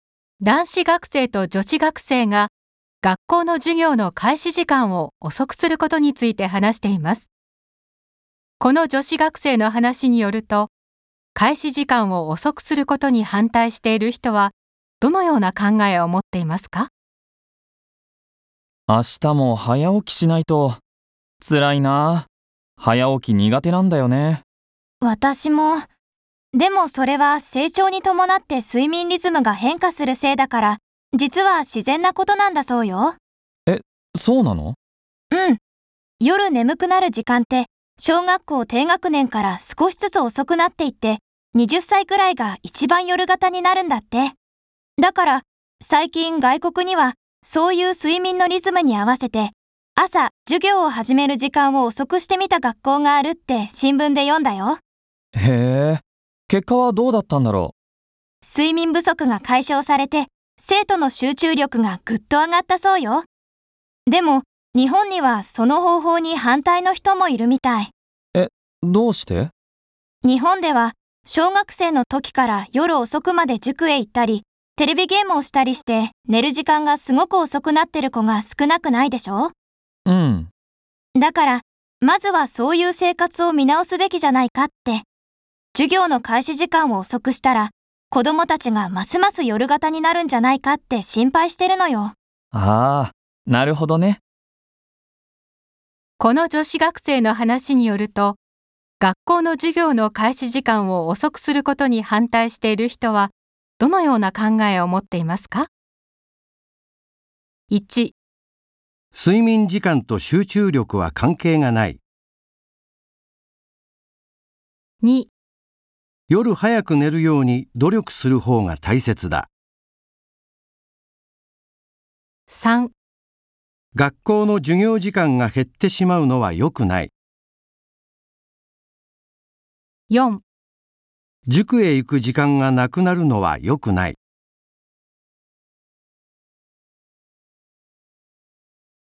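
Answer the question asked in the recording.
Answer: 2: 夜早く寝るように努力する方が大切だ。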